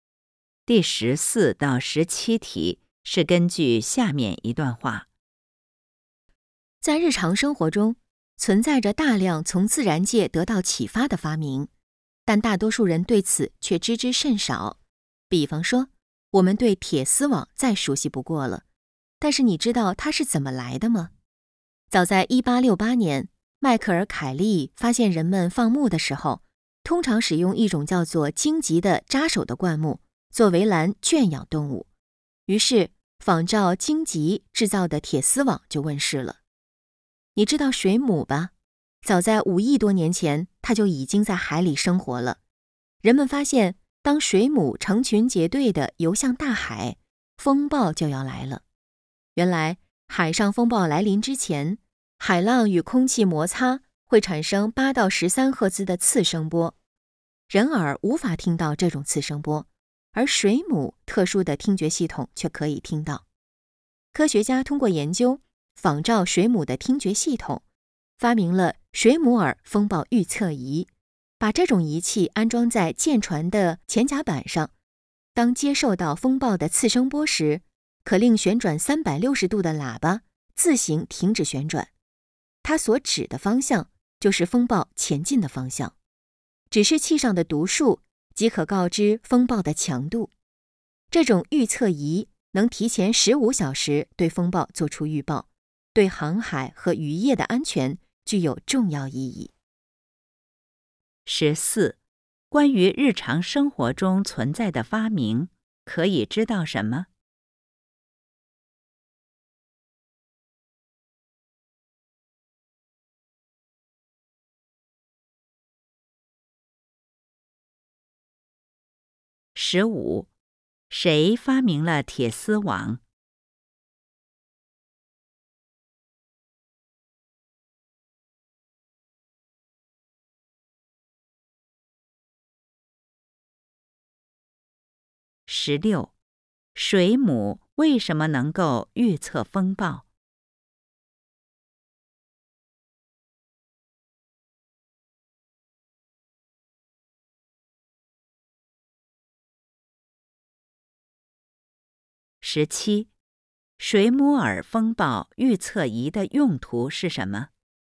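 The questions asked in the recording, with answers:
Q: 关于日常生活中存在的发明,可以知道什么?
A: 很多发明受到自然界的启发,但大多数人对此知之甚少

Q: 谁发明了铁丝网?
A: 迈克尔·凯利

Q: 水母为什么能够预测风暴?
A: 它特殊的听觉系统能听到风暴前的次声波

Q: 水母耳风暴预测仪的用途是什么?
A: 提前约15小时预报风暴的方向和强度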